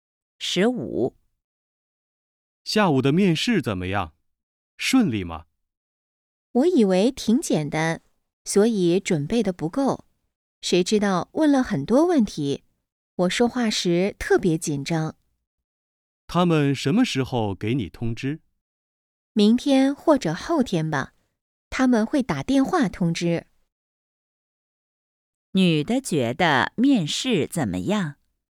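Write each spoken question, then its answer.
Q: 女的觉得面试怎么样?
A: 不顺利,准备不够,很紧张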